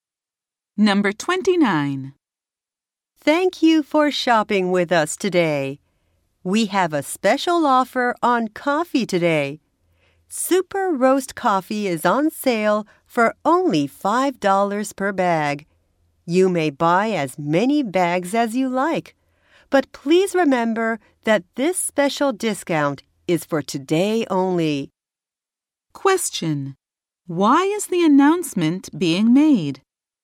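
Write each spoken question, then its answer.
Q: Why is the announcement being made?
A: To tell shoppers about a one-day coffee sale.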